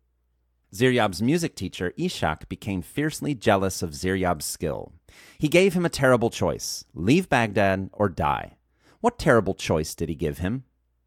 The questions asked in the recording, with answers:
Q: What terrible choice did he give him?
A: He gave him the terrible choice to leave Baghdad or die.